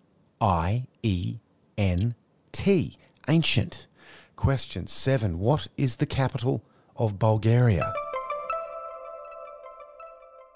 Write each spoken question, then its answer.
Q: What is the capital of Bulgaria?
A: Sofia.